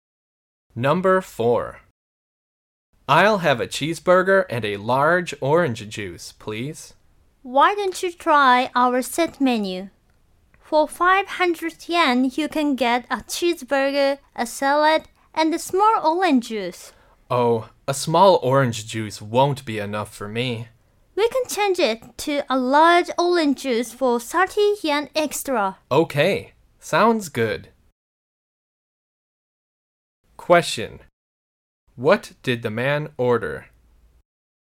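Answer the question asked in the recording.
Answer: The set menu (cheeseburger, salad) with a large orange juice.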